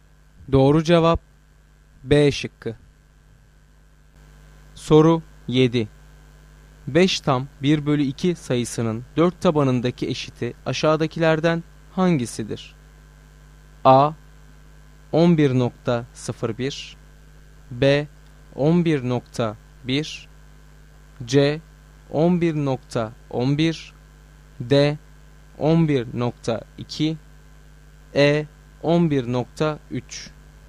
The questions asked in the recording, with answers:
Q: 5 tam 1 bölü 2 sayısının 4 tabanındaki eşiti aşağıdakilerden hangisidir?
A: Doğru cevap D şıkkı.